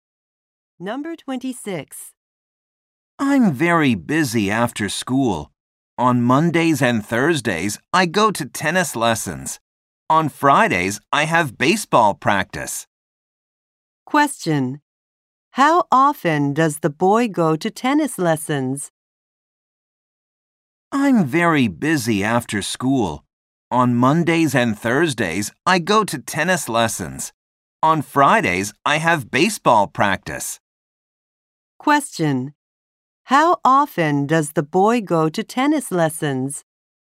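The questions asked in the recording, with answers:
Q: How often does the boy go to tennis lessons?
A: Twice a week.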